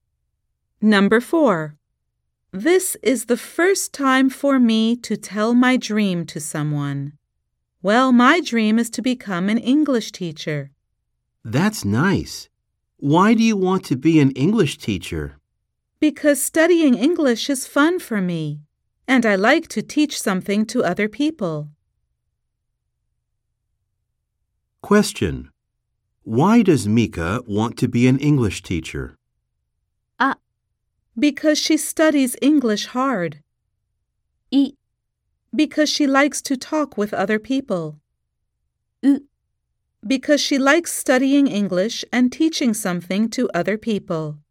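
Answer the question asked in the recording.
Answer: う: Because she likes studying English and teaching something to other people.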